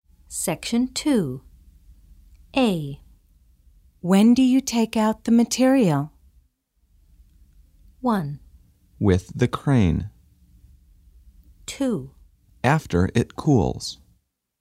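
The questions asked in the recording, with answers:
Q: When do you take out the material?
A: 2: After it cools.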